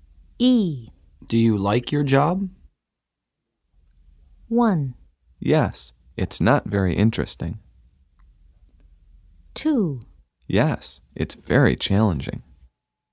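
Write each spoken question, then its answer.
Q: Do you like your job?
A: 2: Yes, it's very challenging.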